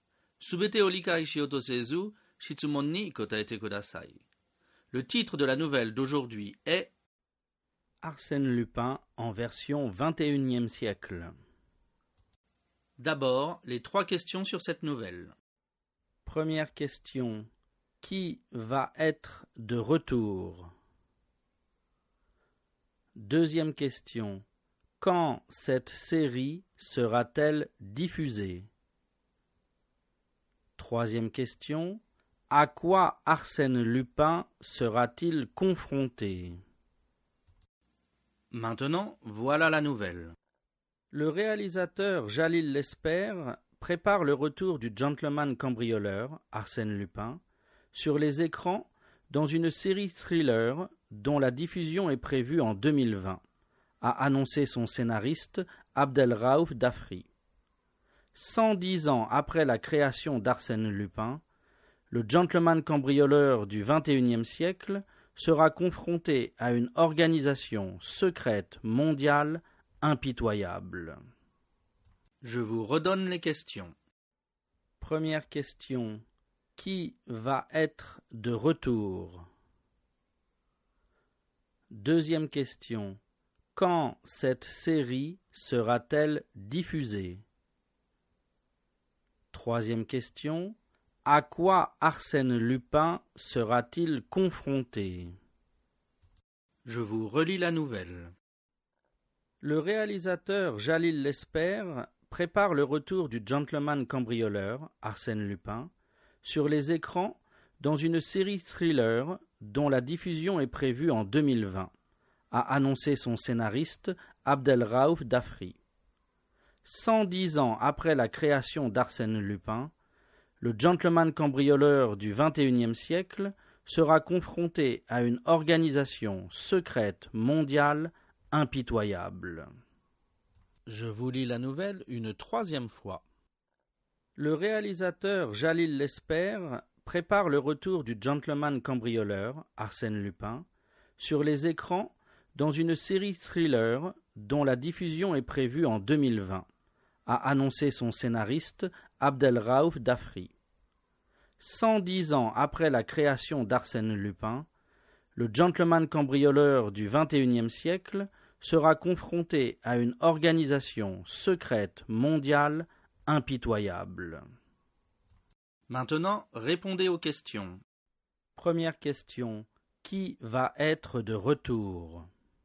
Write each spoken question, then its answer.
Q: Qui va être de retour?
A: Le gentleman cambrioleur Arsène Lupin va être de retour.

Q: Quand cette série sera-t-elle diffusée?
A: Cette série sera diffusée en 2020.

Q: À quoi Arsène Lupin sera-t-il confronté?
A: Le gentleman cambrioleur sera confronté à une organisation secrète mondiale impitoyable.